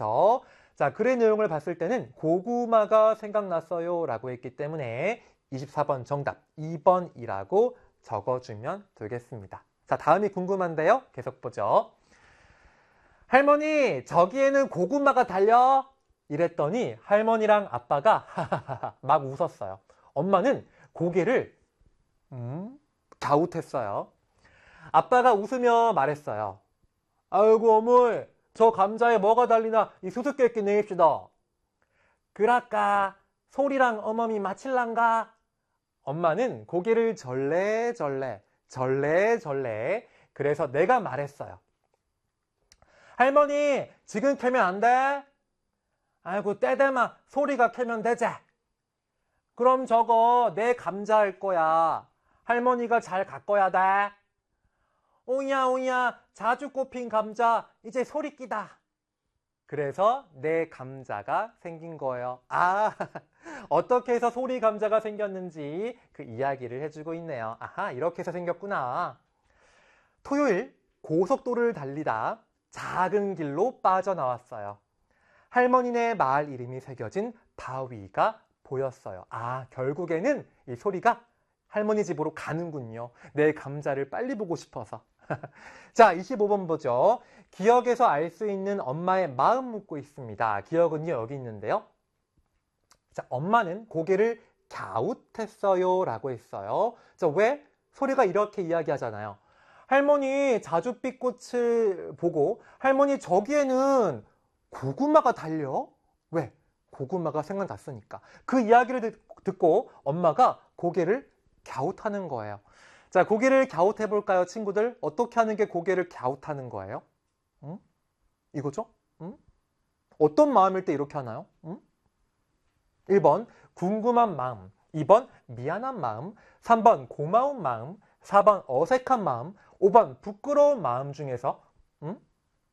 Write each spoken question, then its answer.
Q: 기억에서 알수 있는 엄마의 마음 묻고 있습니다.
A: 이렇게 궁금한 마음 1번으로 정답 찾아주면 되겠습니다.